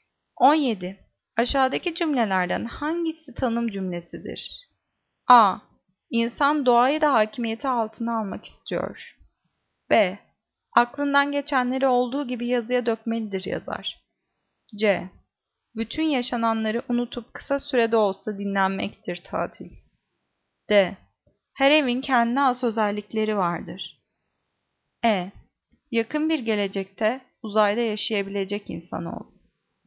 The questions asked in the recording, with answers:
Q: Aşağıdaki cümlelerden hangisi tanım cümlesidir?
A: Cevap C. Bütün yaşananları unutup kısa da olsa dinlenmektir tatil.